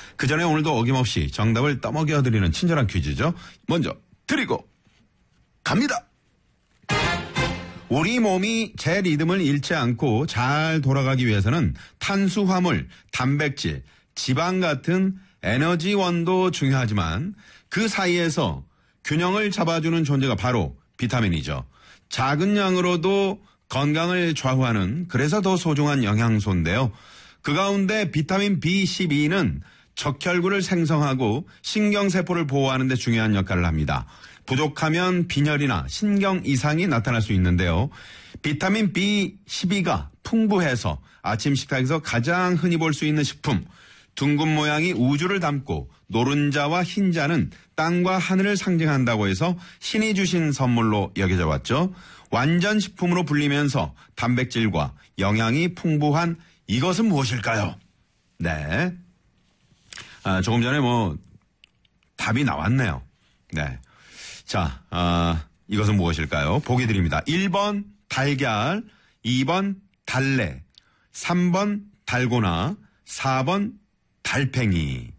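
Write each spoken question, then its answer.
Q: 자, 이것은 무엇일까요? 보기 드립니다. 1번 달걀, 2번 달래, 3번 달고나, 4번 달팽이.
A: 1: 달걀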